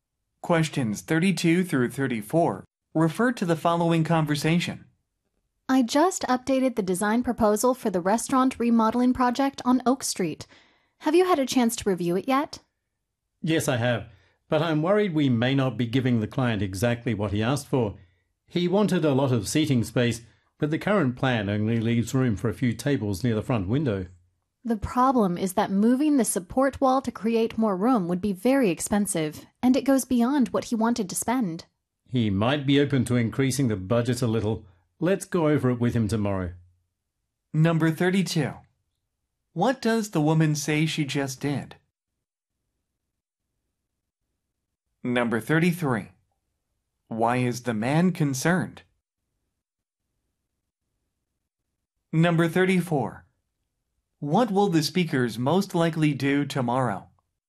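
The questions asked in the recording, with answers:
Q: What does the woman say she just did?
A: She revised the proposal.

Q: Why is the man concerned?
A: The plan may not give the client what he asked for: he wanted a lot of seating, but there is room for only a few tables.

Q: What will the speakers most likely do tomorrow?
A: Go over the plan with the client.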